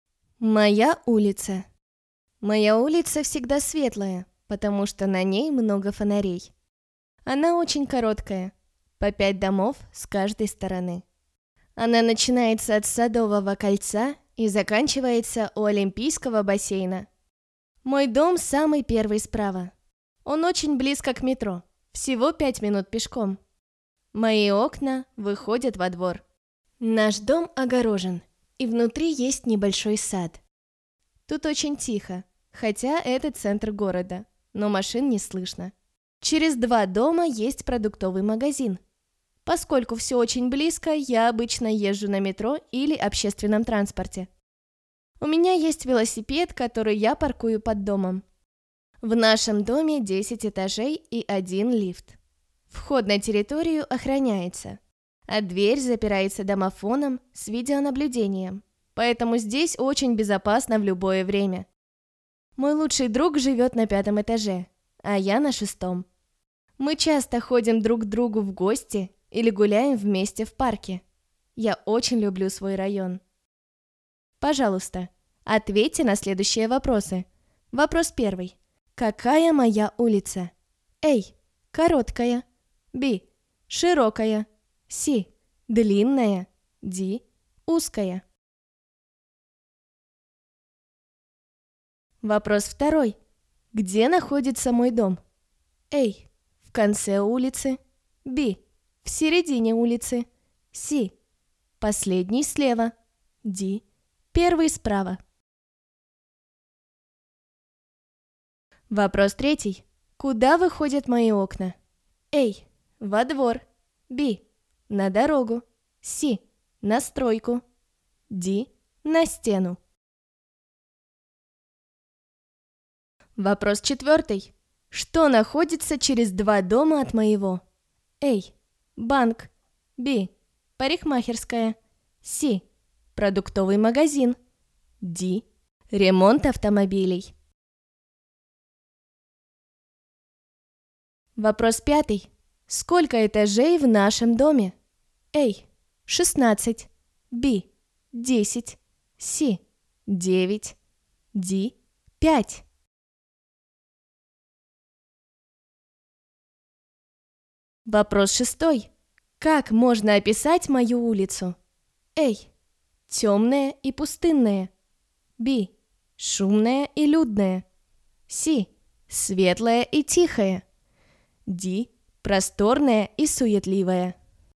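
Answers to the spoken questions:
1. A: короткая
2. D: Первый справа
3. A: Во двор
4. C: Продуктовый магазин
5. B: 10
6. C: Светлая и тихая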